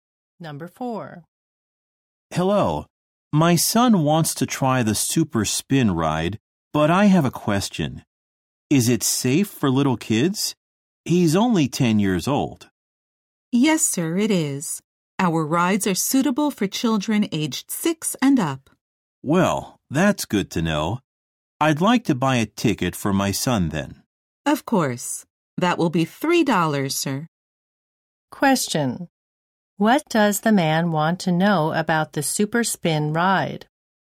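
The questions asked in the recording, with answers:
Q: What does the man want to know about the Super Spin ride?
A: Whether it is safe for little kids.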